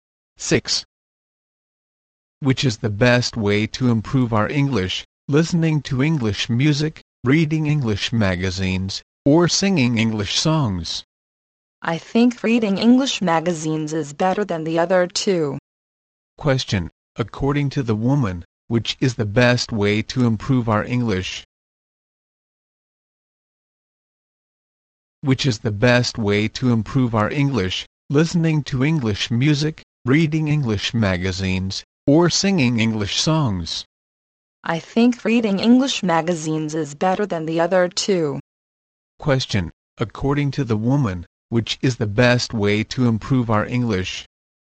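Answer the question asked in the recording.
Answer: Reading English magazines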